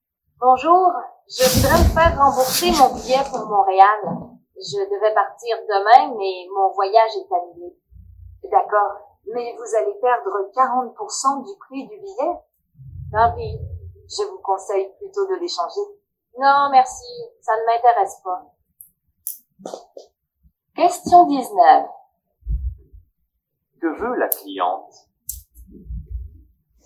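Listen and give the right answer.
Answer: Se faire rembourser son billet pour Montréal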